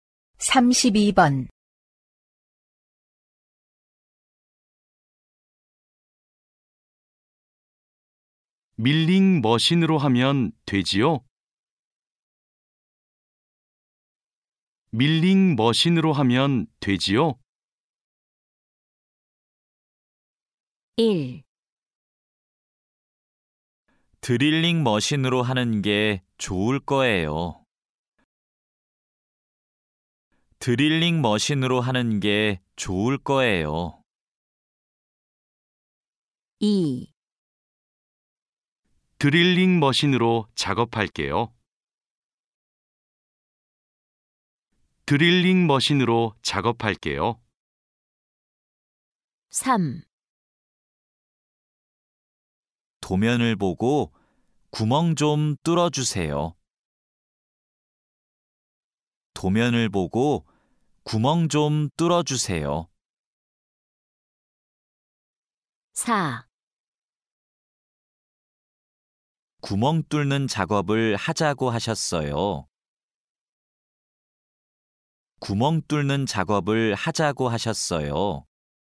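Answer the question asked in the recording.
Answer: 1: 드릴링 머신으로 하는 게 좋을 거예요.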